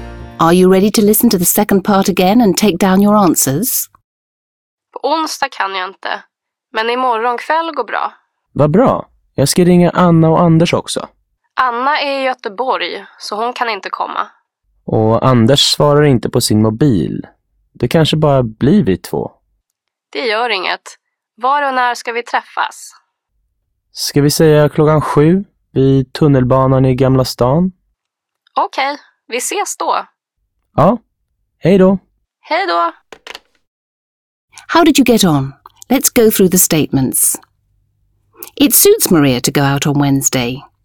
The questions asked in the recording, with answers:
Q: It suits Maria to go out on Wednesday.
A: False. Maria can't go out on Wednesday, so the next night suits her.